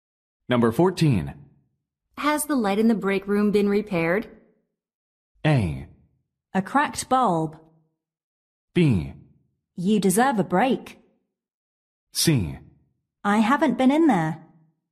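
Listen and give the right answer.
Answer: C: I haven't been in there.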